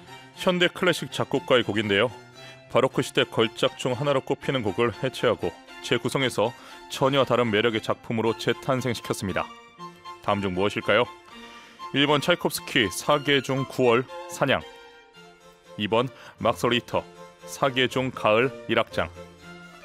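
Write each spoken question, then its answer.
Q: 다음 중 무엇일까요? 1번 차이콥스키 사계 중 9월 사냥, 2번 막스 리히터 사계 중 가을 1악장.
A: 2: 막스 리히터 사계 중 가을 1악장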